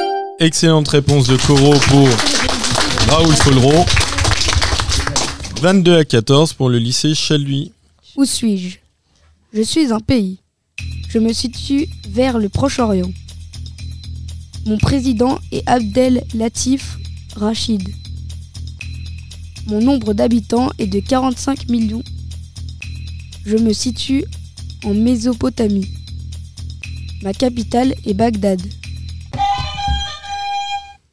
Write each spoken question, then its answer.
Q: Où suis-je?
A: L'Irak.